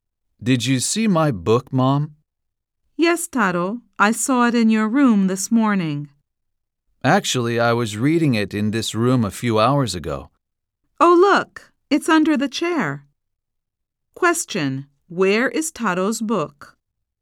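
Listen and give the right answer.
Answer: Under the chair.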